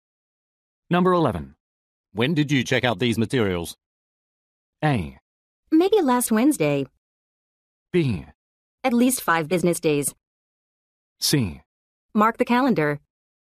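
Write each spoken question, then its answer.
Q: When did you check out these materials?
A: A: Maybe last Wednesday.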